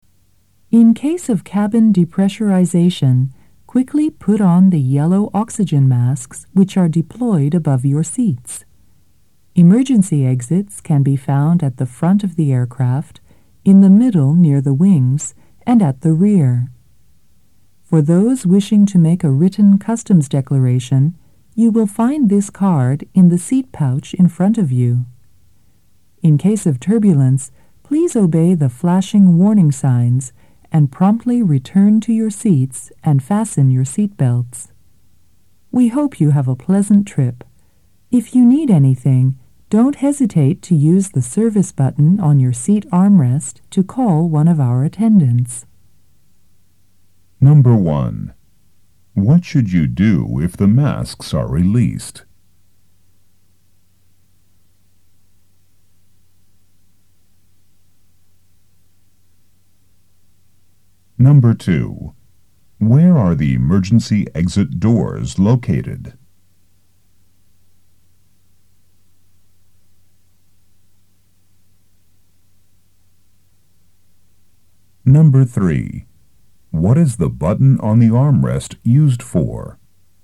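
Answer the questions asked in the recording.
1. Quickly put on the yellow oxygen masks
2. At the front, in the middle near the wings, and at the rear
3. To call an attendant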